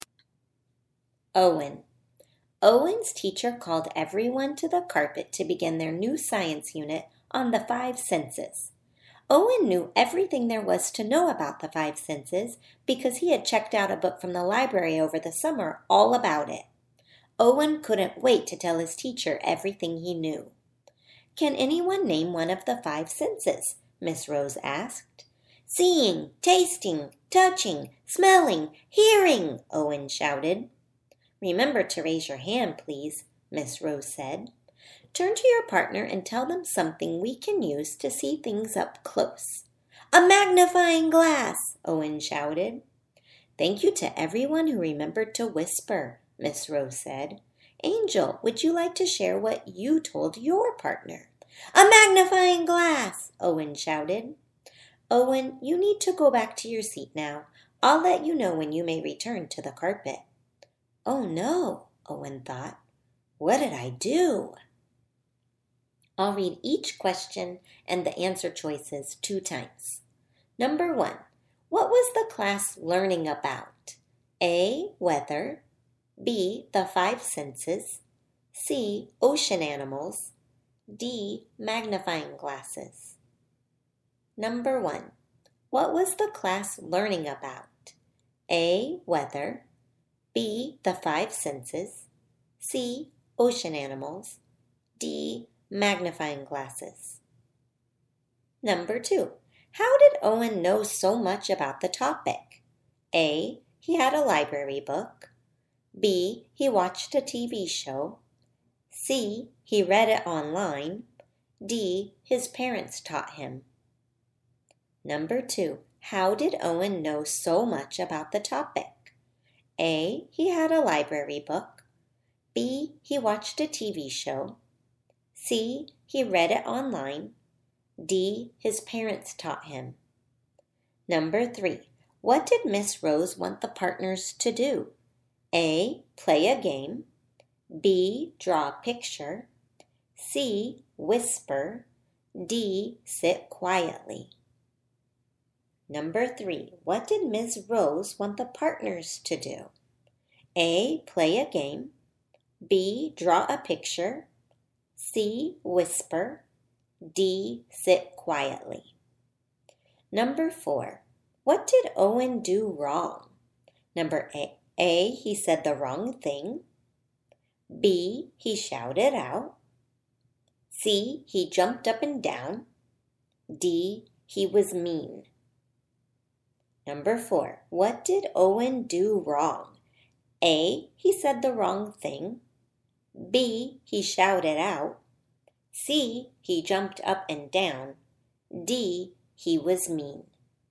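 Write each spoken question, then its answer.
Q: what was the class learning about?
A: B: the five senses

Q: how did Owen know so much about the topic?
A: A: he had a library book

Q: what did Miss Rose want the partners to do?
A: C: whisper

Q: what did Owen do wrong?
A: B: he shouted out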